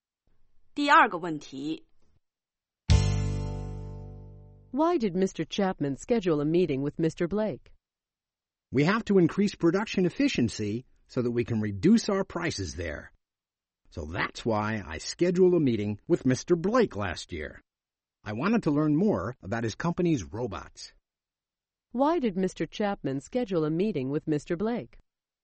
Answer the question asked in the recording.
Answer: He wanted to learn more about the robots made by Mr. Blake's company.